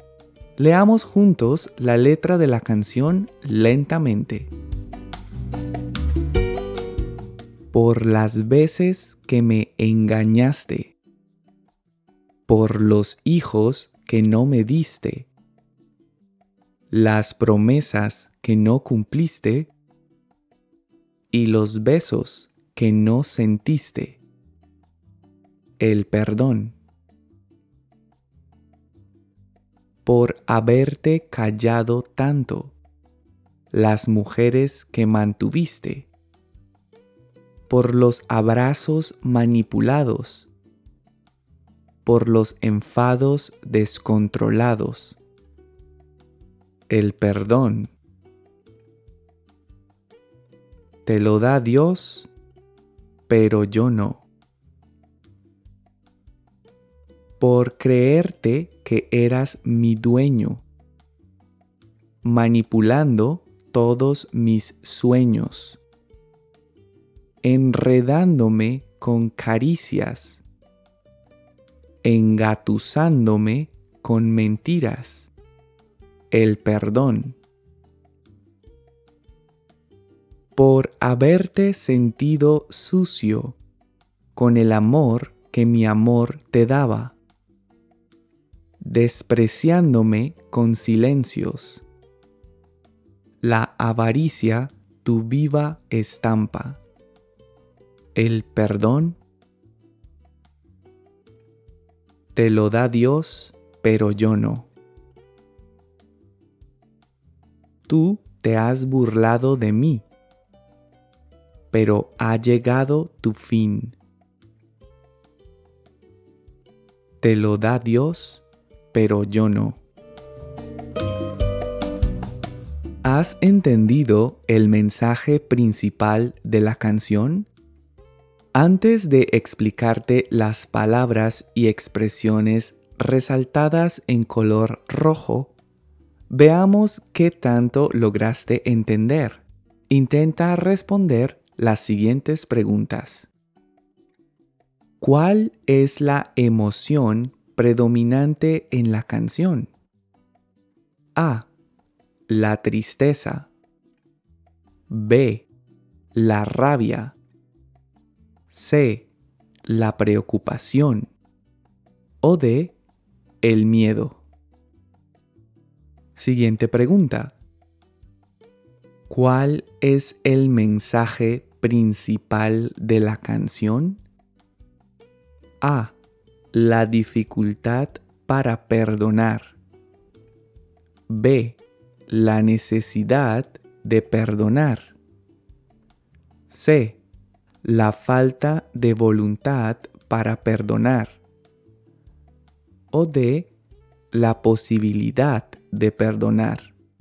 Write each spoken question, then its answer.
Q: ¿Cuál es la emoción predominante en la canción?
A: Y la respuesta es B, la rabia.

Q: ¿Cuál es el mensaje principal de la canción?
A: Y la respuesta es C. La falta de voluntad para perdonar.